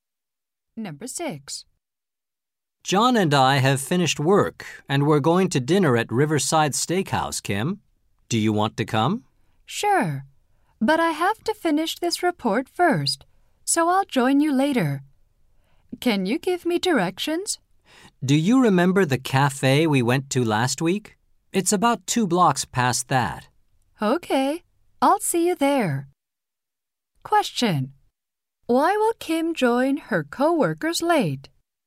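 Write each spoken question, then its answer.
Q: Why will Kim join her co-workers late?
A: She has to finish a report first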